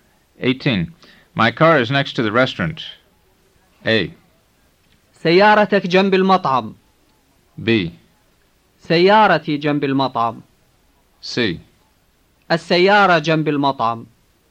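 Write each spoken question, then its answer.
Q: My car is next to the restaurant.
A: B: سيارتي جنب المطعم.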